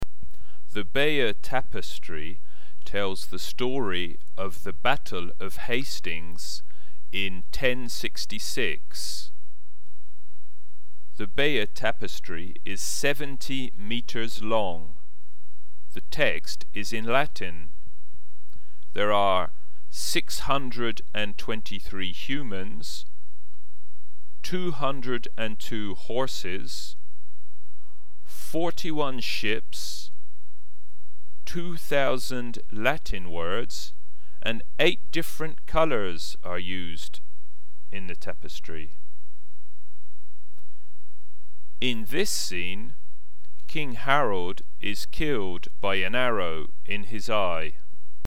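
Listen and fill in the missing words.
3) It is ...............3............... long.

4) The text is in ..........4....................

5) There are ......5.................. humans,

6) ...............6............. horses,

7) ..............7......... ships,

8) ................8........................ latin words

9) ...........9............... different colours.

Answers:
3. 70 meters
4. Latin
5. 623
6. 202
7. 41
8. 2,000
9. 8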